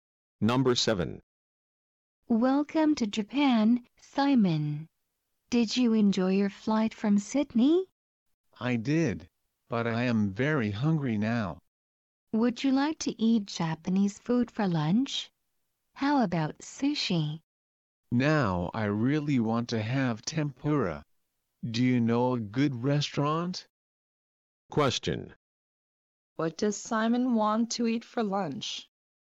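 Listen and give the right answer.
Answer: Tempura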